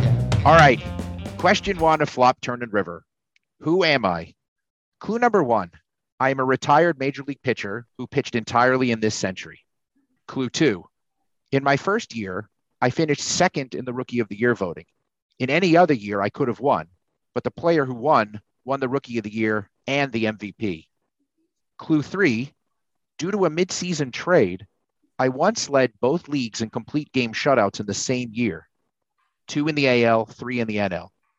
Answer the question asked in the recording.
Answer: So it is, in fact, CeCe Sabathia.